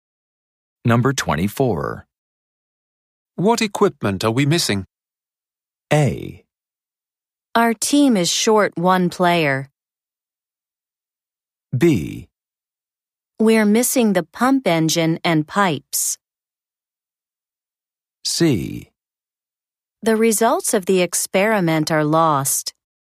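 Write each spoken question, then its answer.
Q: What equipment are we missing?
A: B: We're missing the pump engine and pipes.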